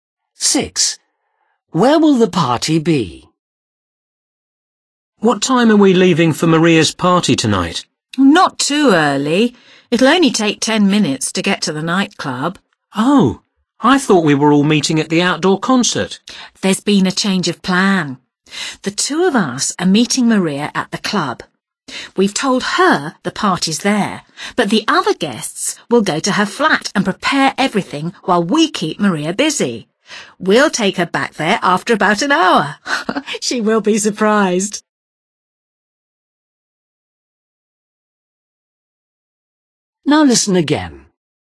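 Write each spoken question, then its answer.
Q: Where will the party be?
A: at Maria's flat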